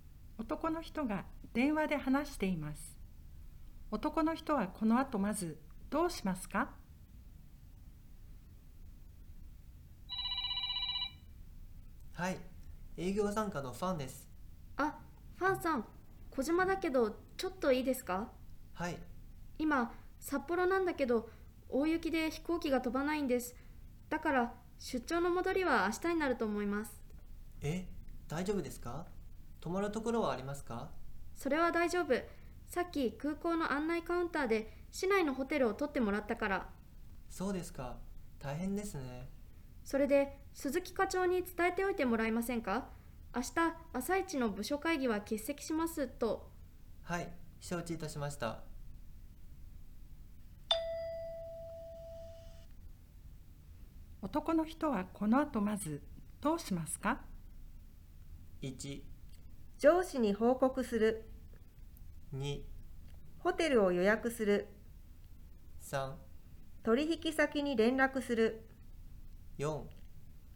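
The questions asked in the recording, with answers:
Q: 男の人はこの後まずどうしますか?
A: 1: 上司に報告する。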